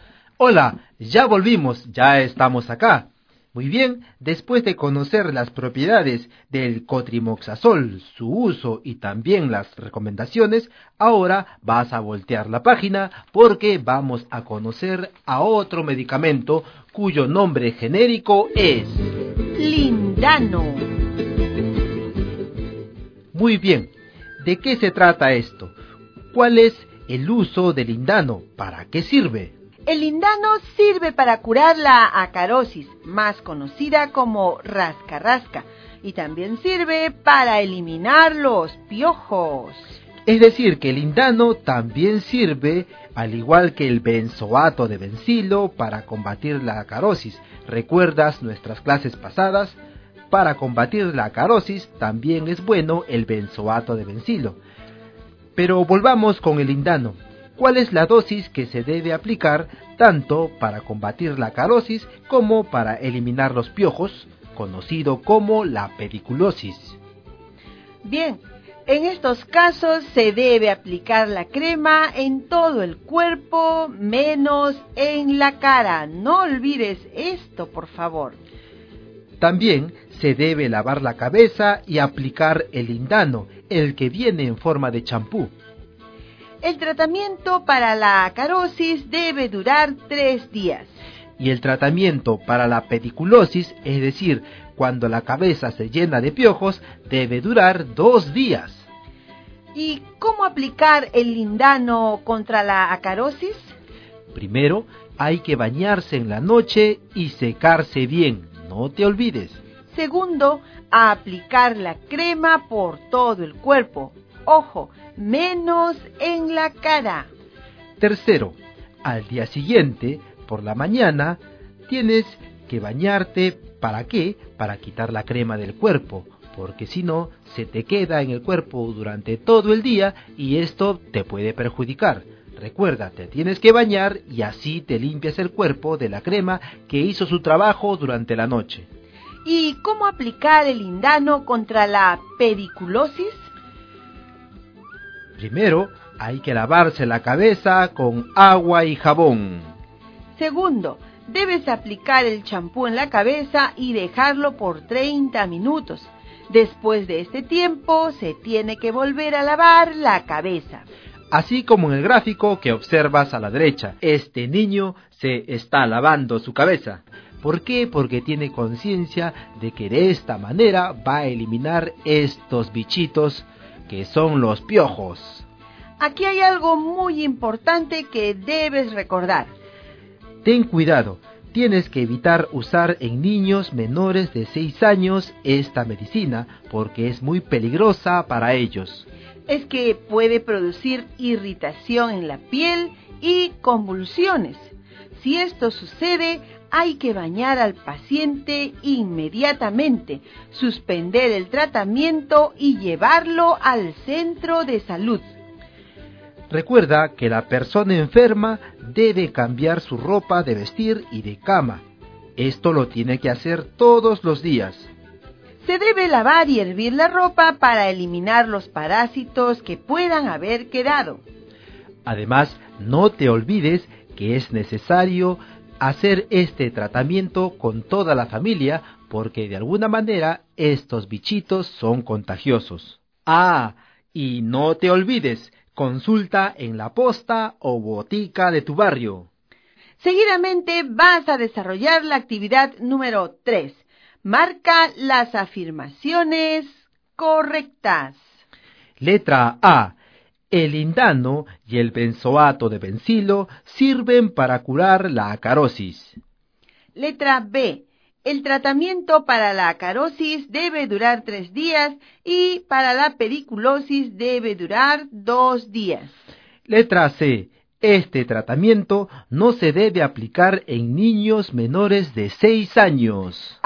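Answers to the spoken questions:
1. Correcta
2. Correcta
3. Correcta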